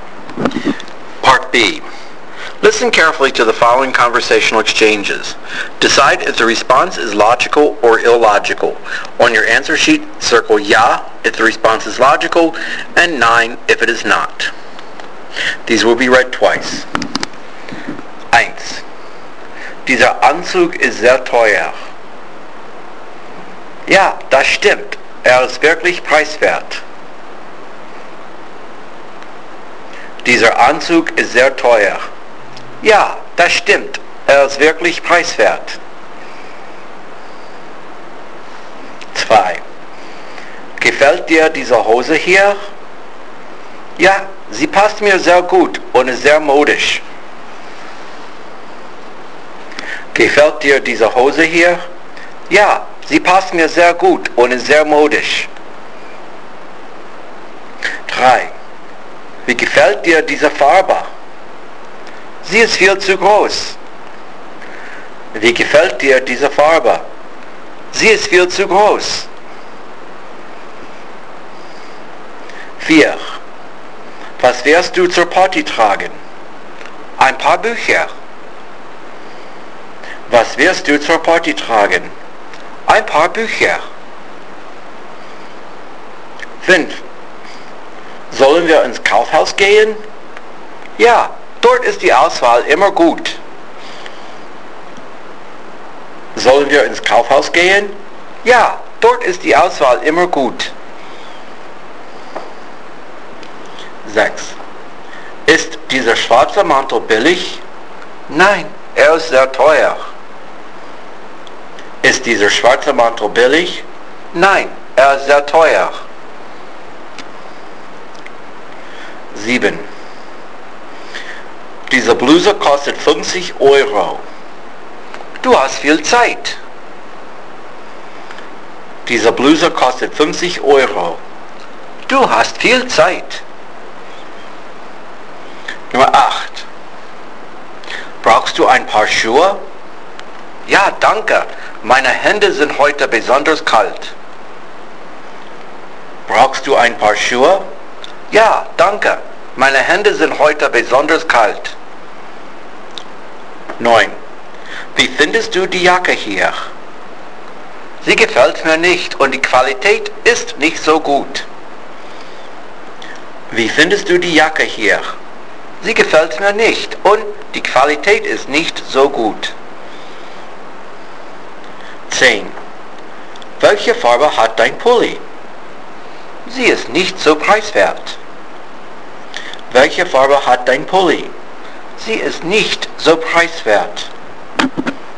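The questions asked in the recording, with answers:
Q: Dieser Anzug ist sehr teuer. Ja, das stimmt. Ist wirklich preiswert.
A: illogical

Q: Gefällt dir diese Hose hier? Ja, sie passt mir sehr gut und ist sehr modisch.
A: logical

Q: Wie gefällt dir diese Farbe? Sie ist viel zu groß.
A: illogical

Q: Was wirst du zur Party tragen? Ein paar Bücher.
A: illogical

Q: Sollen wir ins Kaufhaus gehen? Ja, dort ist die Auswahl immer gut.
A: logical

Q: Ist dieser schwarze Mantel billig? Nein, ist sehr teuer.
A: logical

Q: Diese Bluse kostet 50 Euro. Du hast viel Zeit.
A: illogical

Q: Brauchst du ein paar Schuhe? Ja, danke. Meine Hände sind heute besonders kalt.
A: illogical

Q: Wie findest du die Jacke hier? Sie gefällt mir nicht und die Qualität ist nicht so gut.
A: logical

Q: Welche Farbe hat dein Pulli? Sie ist nicht so preiswert.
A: illogical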